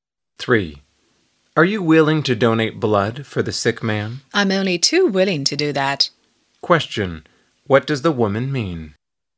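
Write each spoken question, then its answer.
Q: what does the woman mean?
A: She is very willing to donate blood.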